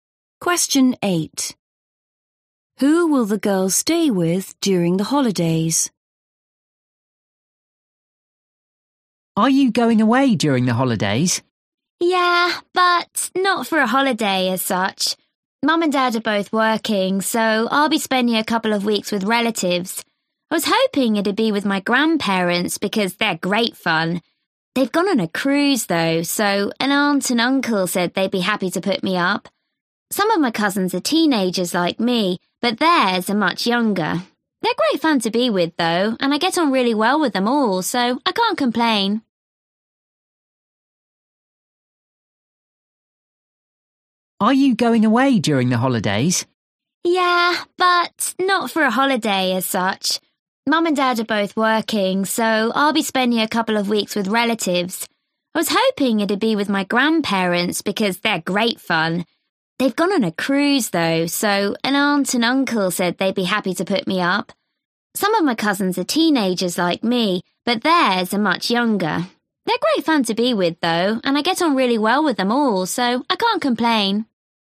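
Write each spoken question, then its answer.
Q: Who will the girls stay with during the holidays?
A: her aunt and uncle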